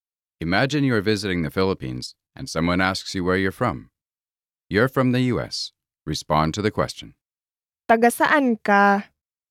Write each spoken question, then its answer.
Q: Taga saan ka?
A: Taga Amerika ako.